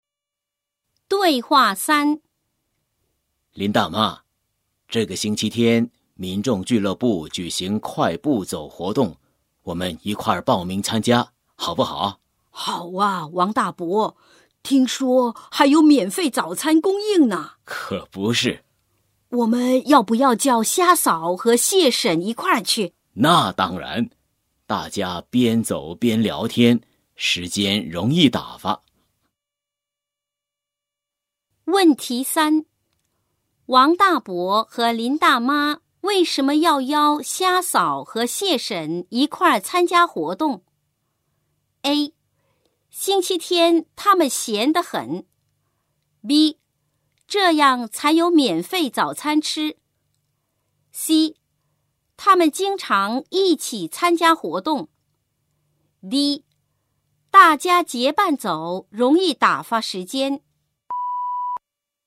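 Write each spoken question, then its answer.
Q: 王大伯和林大妈为什么要邀虾嫂和蟹婶一块儿参加活动?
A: D: 大家结伴走容易打发时间。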